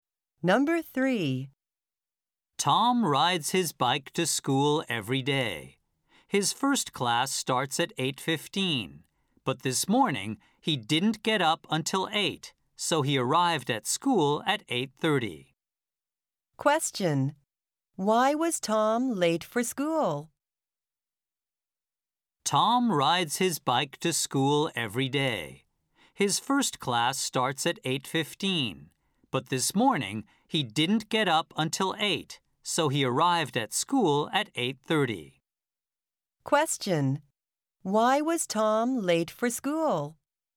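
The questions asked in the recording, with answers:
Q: Why was Tom late for school?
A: He didn't get up until 8 (he got up late).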